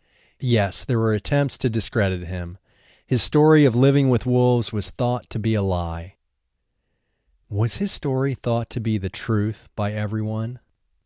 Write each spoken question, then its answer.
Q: Was his story thought to be the truth by everyone?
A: No, his story was thought to be a lie by some people.